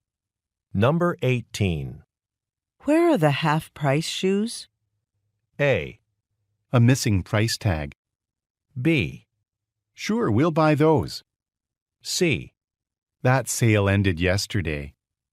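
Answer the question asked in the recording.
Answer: C: That sale ended yesterday.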